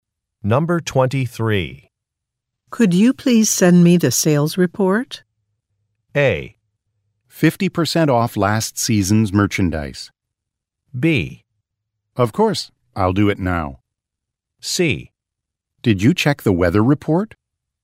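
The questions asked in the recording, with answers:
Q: Could you please send me the sales report?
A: B: Of course, I'll do it now.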